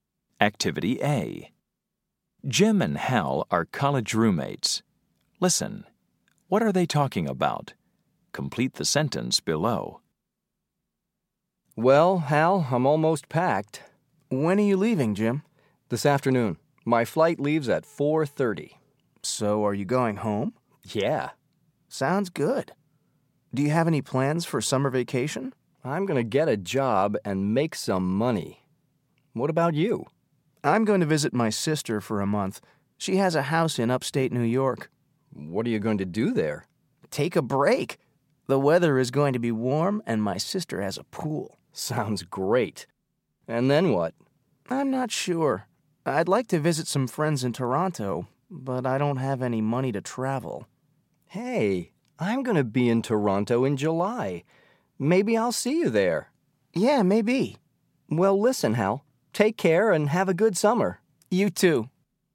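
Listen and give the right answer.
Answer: Their plans for summer vacation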